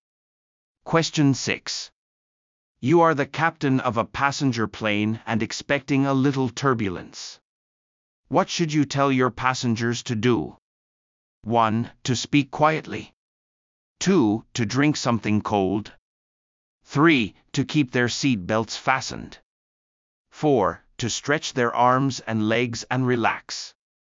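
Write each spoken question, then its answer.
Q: What should you tell your passengers to do?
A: 3: To keep their seat belts fastened.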